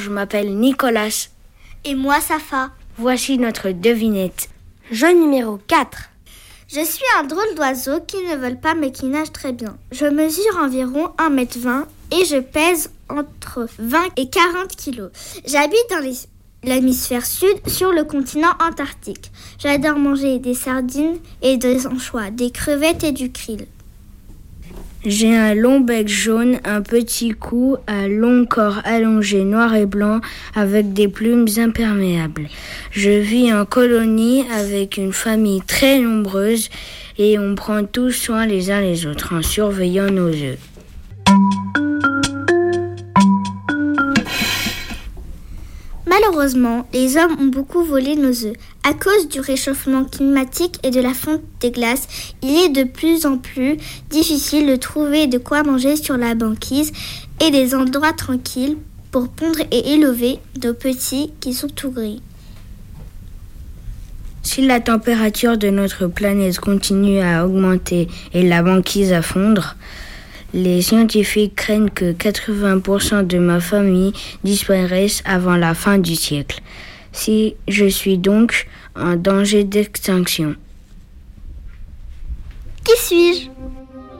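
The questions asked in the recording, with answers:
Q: Qui suis-je ?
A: le manchot empereur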